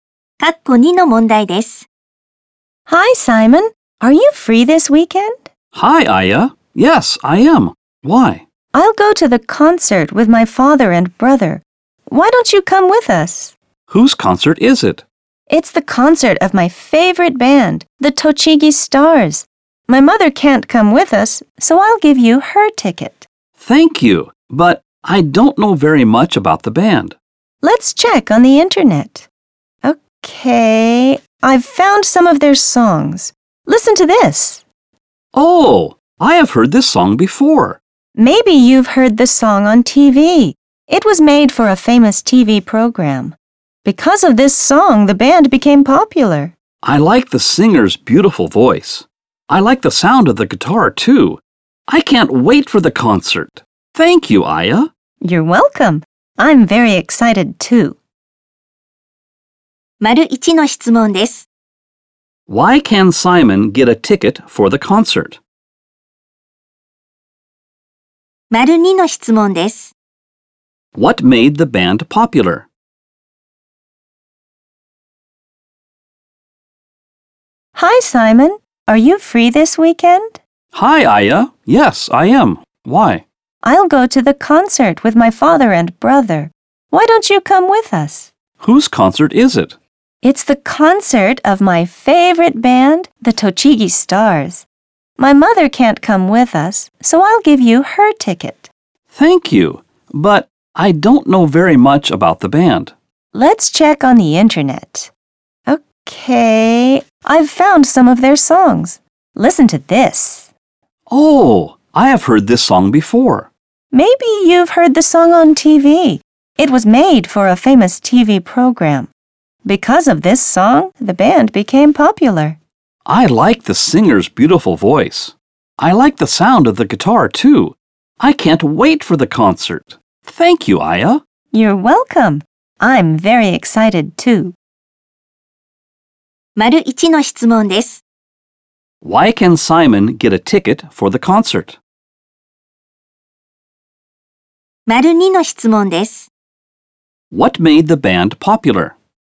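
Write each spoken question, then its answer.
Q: Why can Simon get a ticket for the concert?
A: Because Aya's mother can't go, so Aya gives him her ticket

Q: What made the band popular?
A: A song made for a famous TV program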